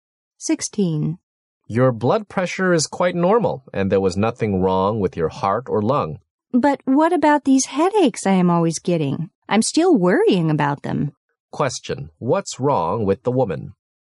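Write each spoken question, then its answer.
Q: what's wrong with the woman?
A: She keeps getting headaches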